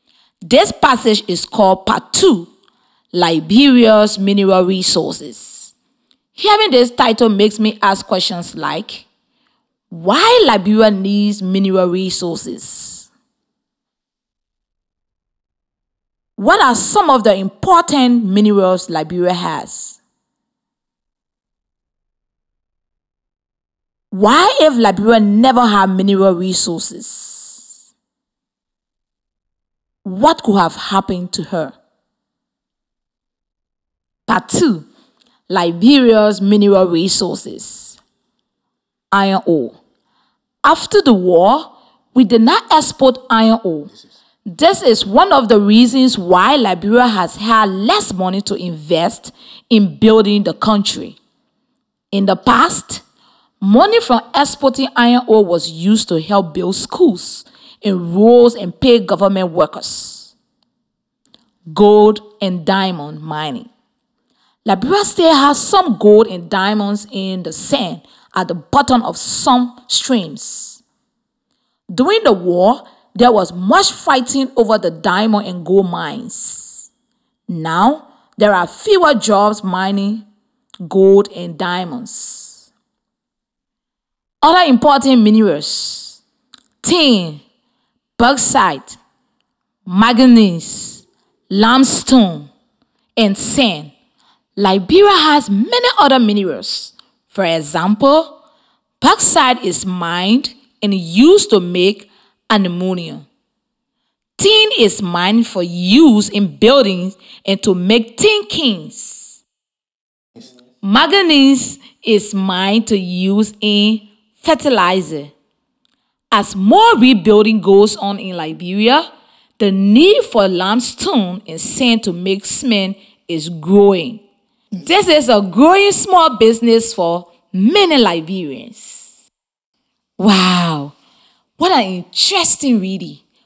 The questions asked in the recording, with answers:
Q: What are some of the important minerals Liberia has?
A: some of the important minerals Liberia has are tin, bauxite, manganese, limestone, and sand.